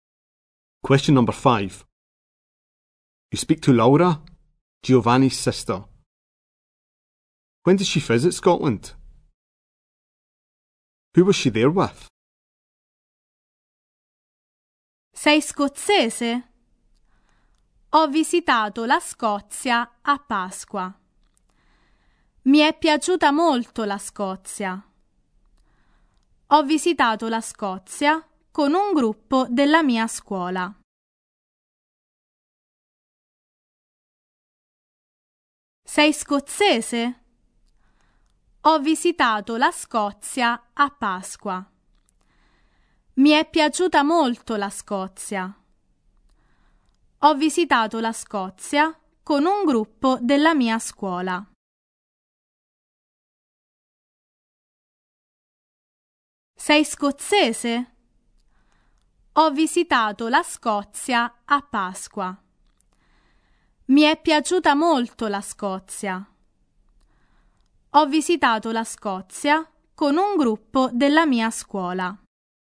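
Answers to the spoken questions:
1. At Easter
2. A group from her school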